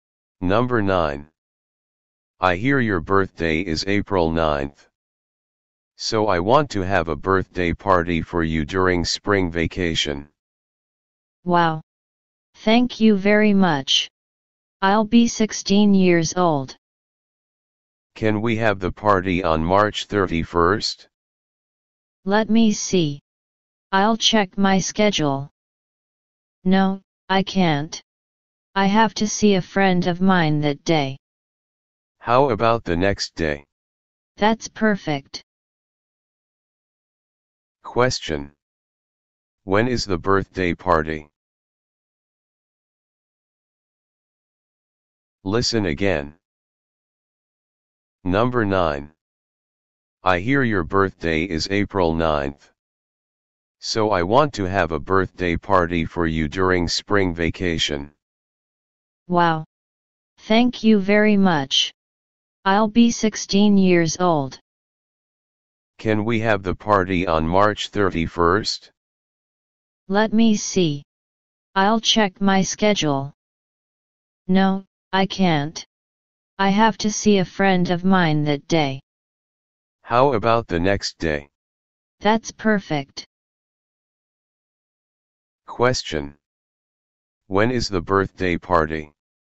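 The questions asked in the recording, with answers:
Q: When is the birthday party?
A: On April 1st.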